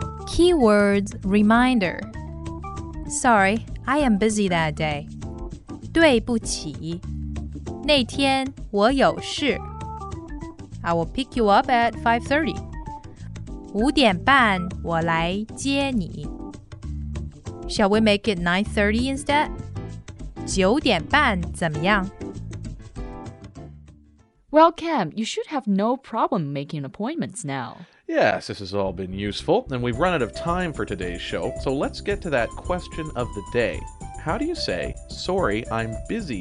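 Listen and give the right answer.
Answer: 对不起,那天我有事。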